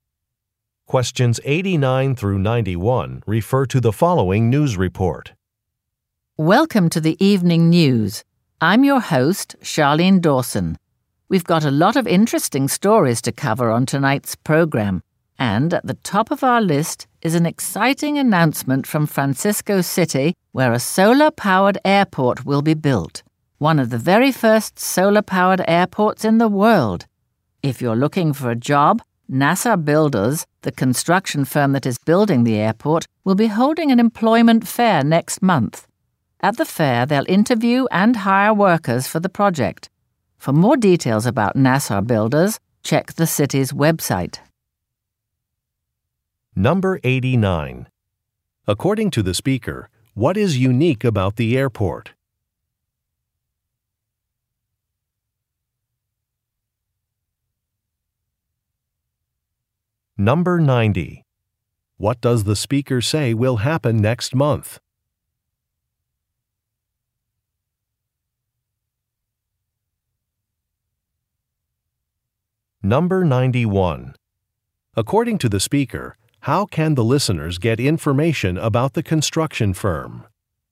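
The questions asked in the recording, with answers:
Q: According to the speaker, what is unique about the airport?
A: It will be solar-powered

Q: What does the speaker say will happen next month?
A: An employment fair will be held

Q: According to the speaker, how can the listeners get information about the construction firm?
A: By checking the city's website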